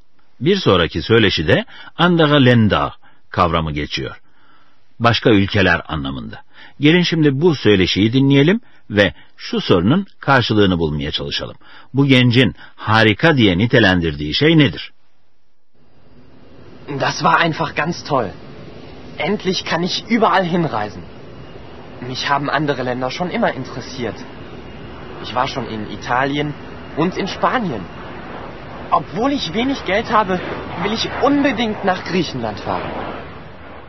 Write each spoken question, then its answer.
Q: Bu gencin harika diye nitelendirdiği şey nedir?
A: Evet, bu genç nihayet artık özgürce seyahat edebilmesini harika diye nitelendirdi.